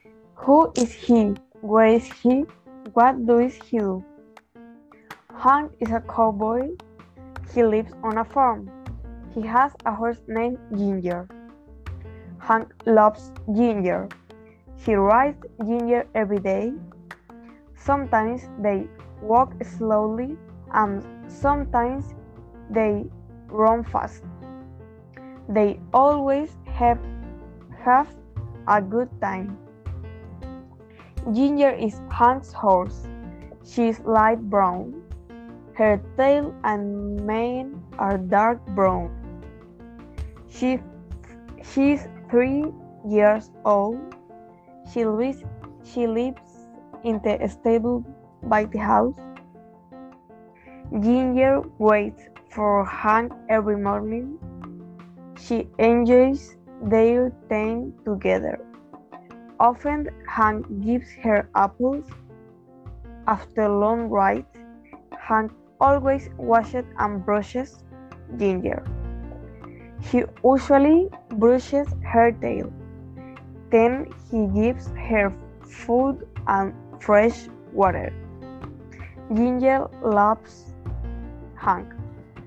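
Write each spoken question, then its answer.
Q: Who is he?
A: Hank, a cowboy

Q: Where is he?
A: On a farm

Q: What does he do?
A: He is a cowboy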